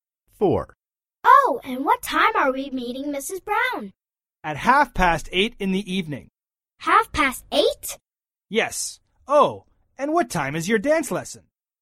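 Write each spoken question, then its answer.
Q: Oh, and what time are we meeting Mrs. Brown?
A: 8:30 in the evening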